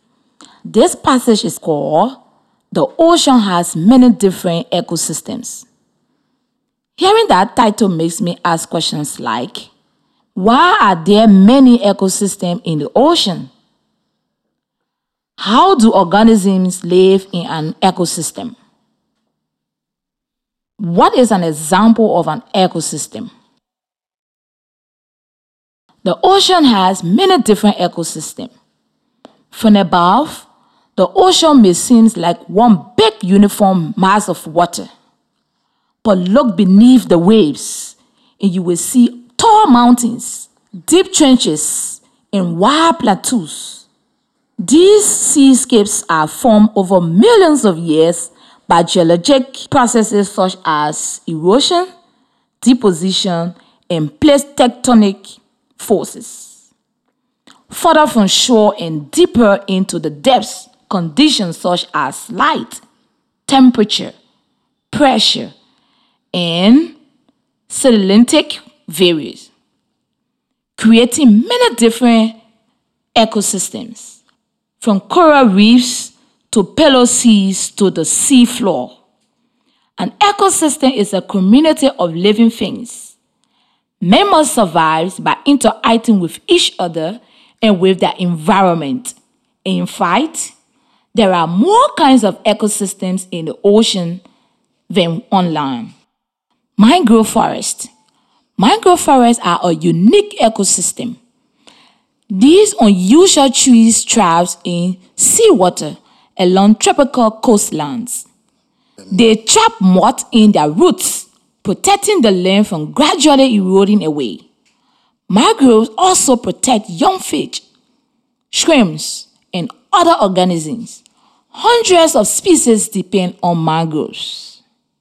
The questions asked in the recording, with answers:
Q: why are there many ecosystems in the ocean?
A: conditions such as light, temperature, pressure, and salinity vary, creating many different ecosystems.

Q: How do organisms live in an ecosystem?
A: Members survive by interacting with each other and with their environment.

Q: What is an example of an ecosystem?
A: mangrove forests are unique ecosystem.